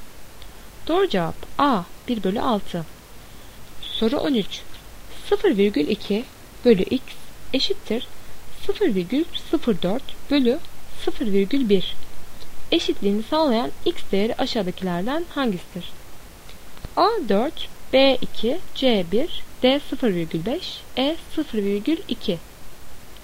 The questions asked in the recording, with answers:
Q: 0,2 bölü x eşittir 0,04 bölü 0,1 eşitliğini sağlayan x değeri aşağıdakilerden hangisidir?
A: Doğru cevap D 0,5.